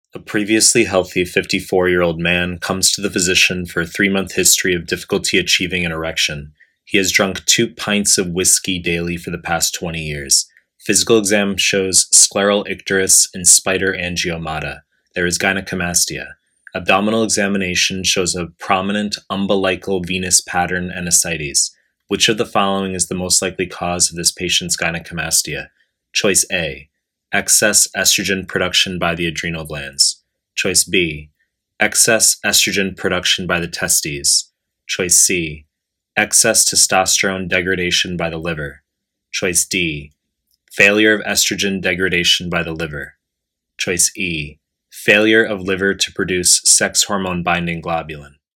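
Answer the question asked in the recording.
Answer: D: failure of estrogen degradation by the liver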